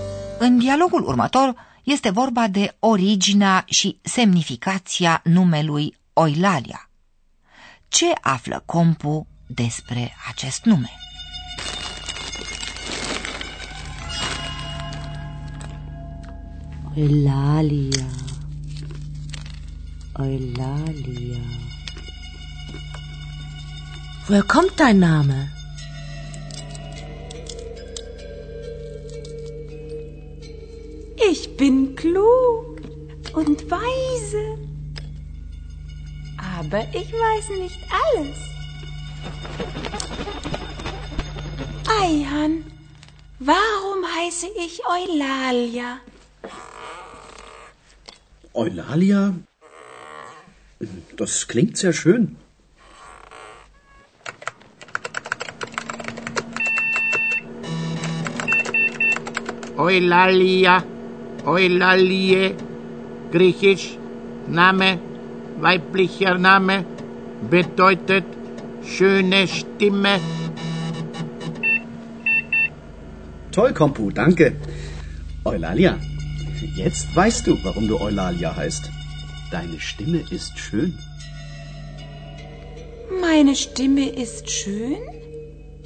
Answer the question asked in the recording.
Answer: Unul e acela că Oilalia e un nume grecesc, un nume feminin.